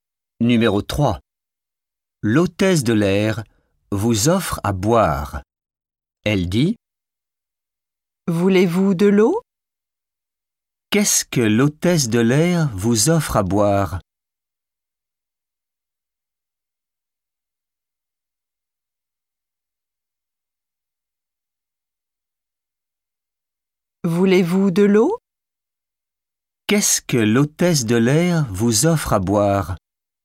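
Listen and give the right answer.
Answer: De l'eau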